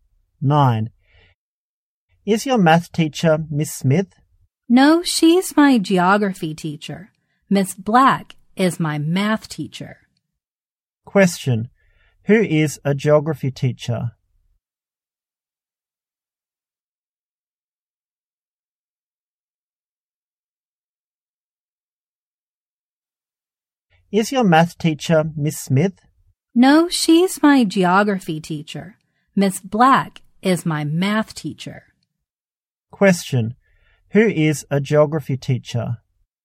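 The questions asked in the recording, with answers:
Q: Question, who is a geography teacher?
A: Miss Smith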